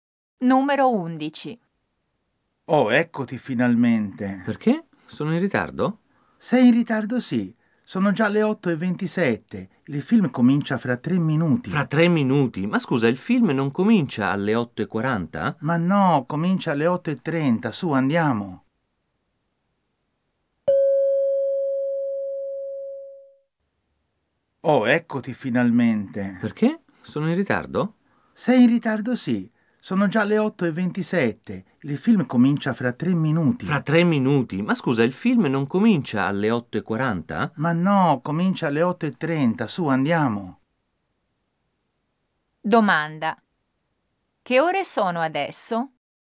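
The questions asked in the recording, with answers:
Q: Che ore sono adesso?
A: Le 8:27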